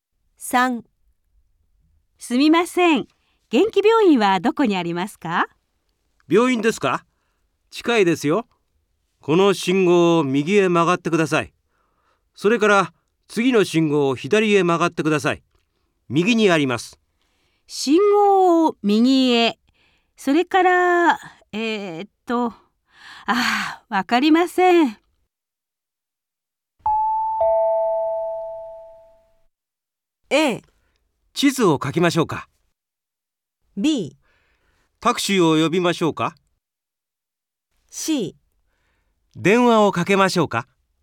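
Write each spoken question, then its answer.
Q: わかりません。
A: A: 地図を書きましょうか。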